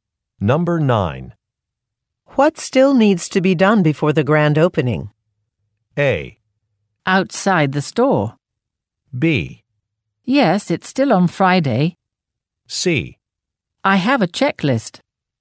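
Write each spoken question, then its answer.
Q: What still needs to be done before the grand opening?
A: C: I have a checklist.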